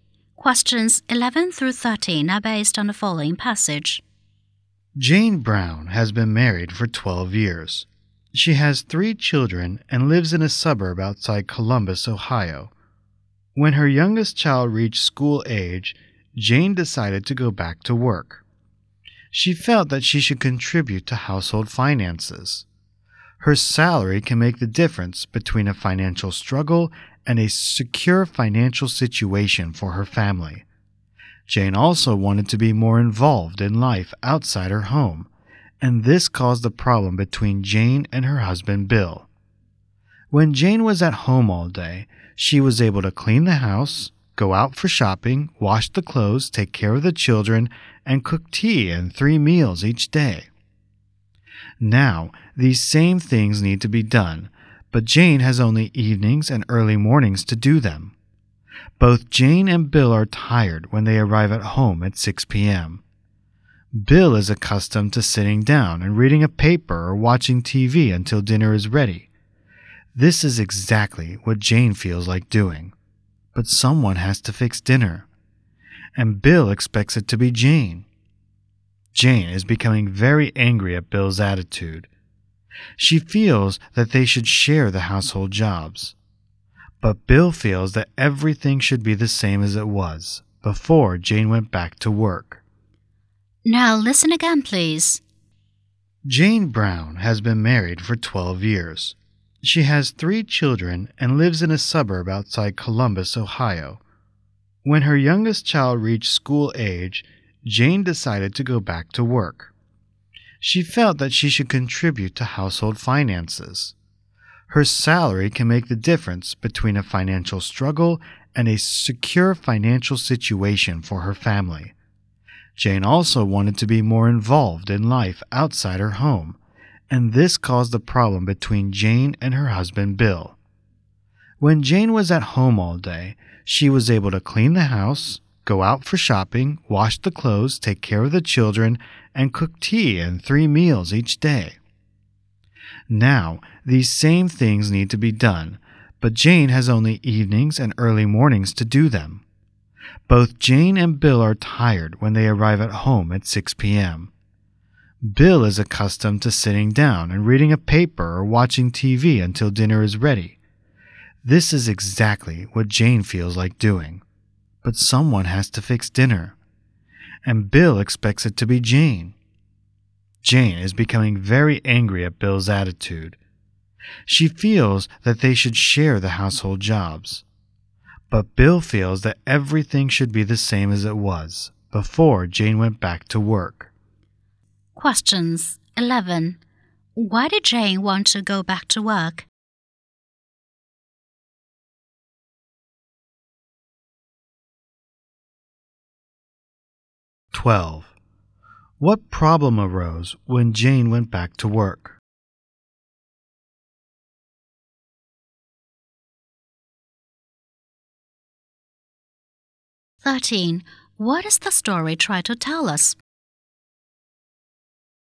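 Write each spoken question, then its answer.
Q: Why did Jane want to go back to work?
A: To contribute to household finances

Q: What problem arose when Jane went back to work?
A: Bill wouldn't share the housework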